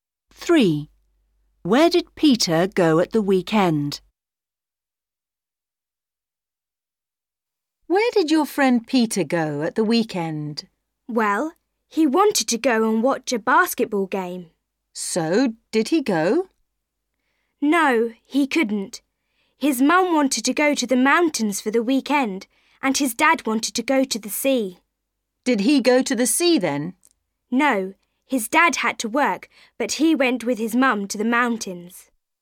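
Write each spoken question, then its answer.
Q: Where did Peter go at the weekend?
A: to the mountains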